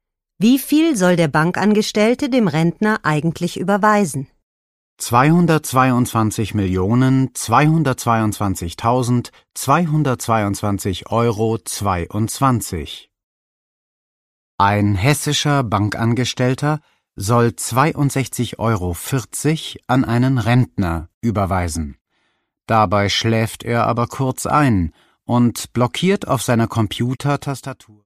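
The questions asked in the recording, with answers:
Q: Wie viel soll der Bankangestellte dem Rentner eigentlich überweisen?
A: 62,40 €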